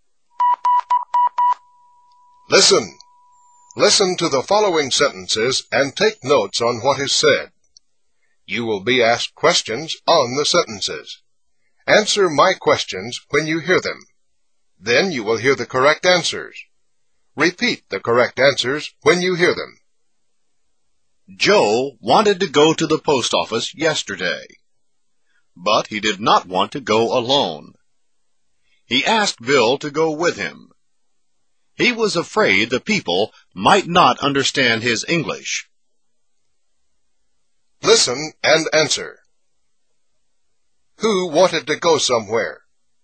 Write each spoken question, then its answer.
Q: Who wanted to go somewhere?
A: Joe. Joe wanted to go somewhere.